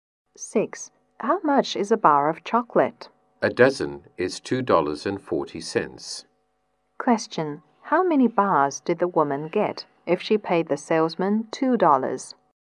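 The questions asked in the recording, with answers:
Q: How many bars did the woman get if she paid the salesman $2?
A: 10 bars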